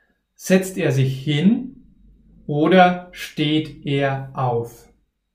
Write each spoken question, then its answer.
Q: Setzt er sich hin oder steht er auf?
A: Er steht auf.